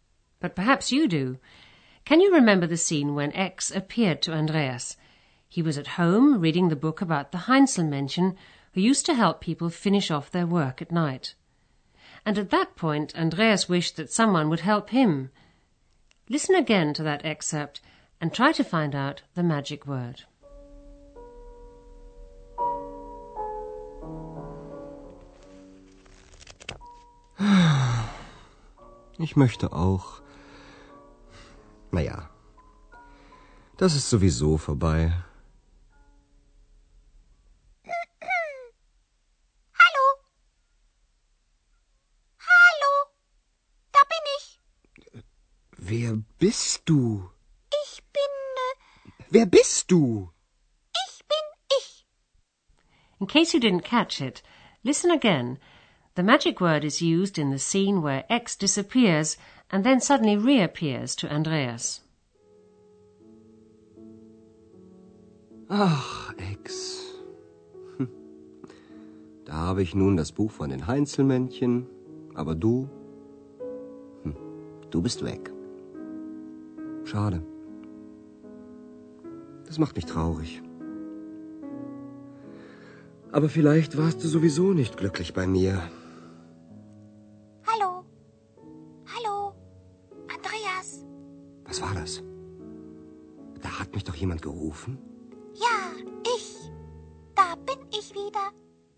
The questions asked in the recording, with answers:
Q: Listen again to that excerpt and try to find out the magic word.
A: The magic word is sowieso.